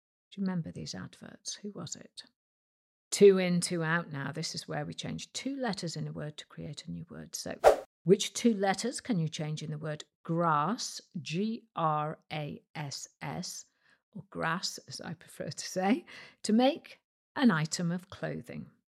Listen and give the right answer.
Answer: Change the G to a D and the A to an E to get a dress, D-R-E-S-S.